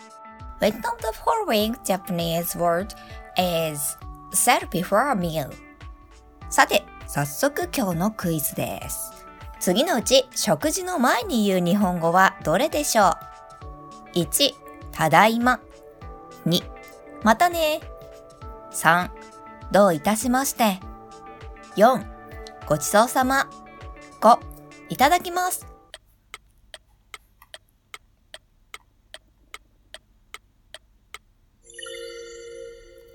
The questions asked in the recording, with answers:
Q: 次のうち食事の前に言う日本語はどれでしょう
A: Correct answer is number 5正解は5です。